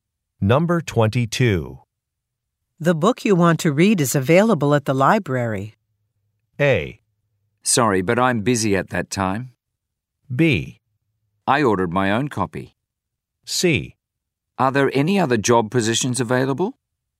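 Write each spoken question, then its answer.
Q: The book you want to read is available at the library.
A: B: I ordered my own copy.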